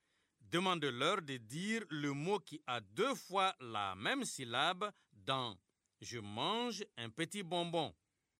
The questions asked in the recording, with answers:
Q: Demandez-leur de dire le mot qui a deux fois la même syllabe dans « Je mange un petit bonbon ».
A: Monsieur, c'est bonbon.